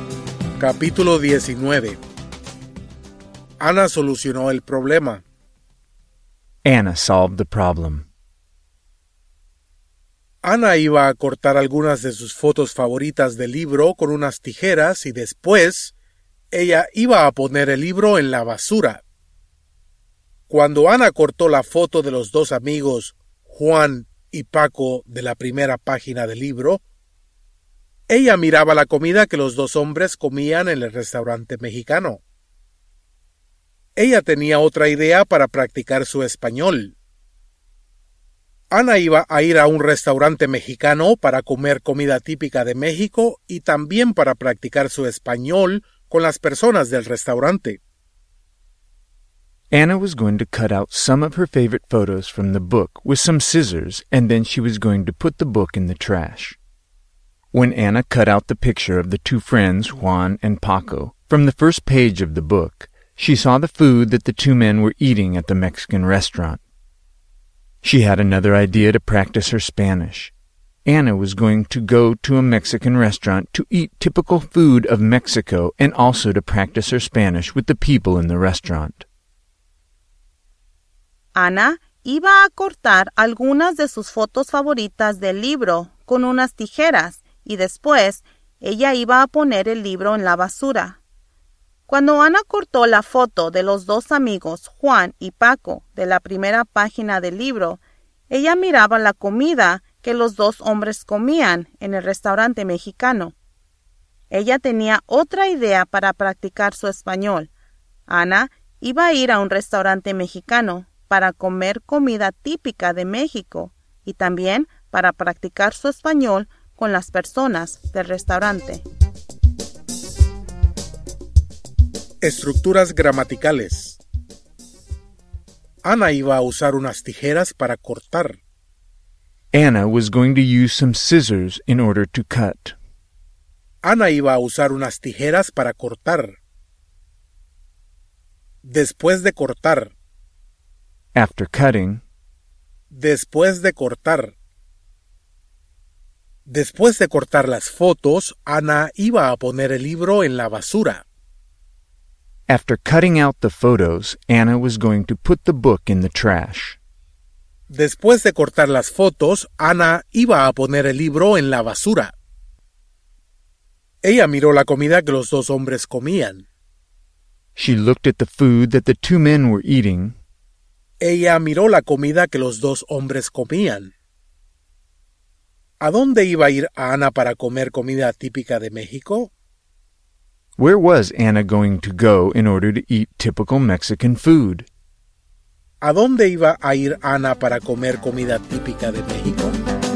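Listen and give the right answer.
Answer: A un restaurante mexicano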